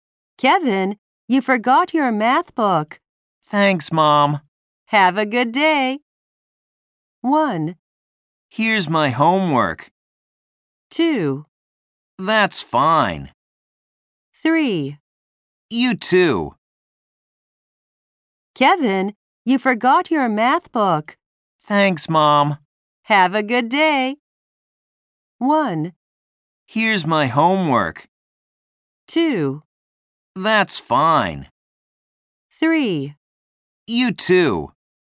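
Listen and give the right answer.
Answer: 3: You too.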